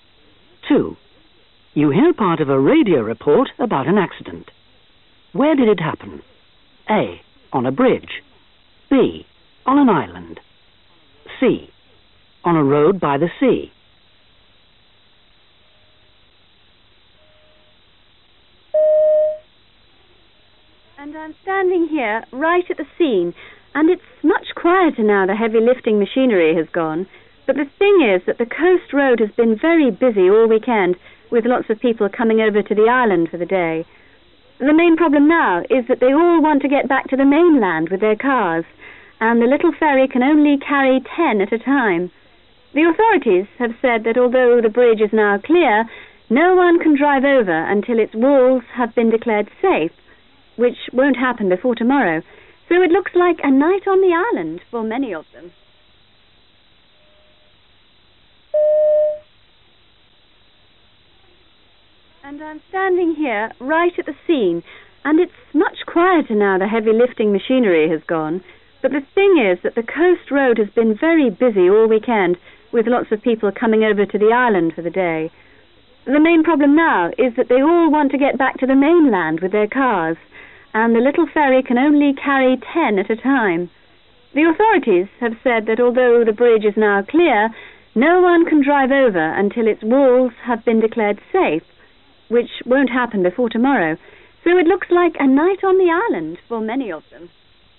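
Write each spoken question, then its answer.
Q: Where did it happen? A. On a bridge. B. On an island. C. On a road by the sea.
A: A: On a bridge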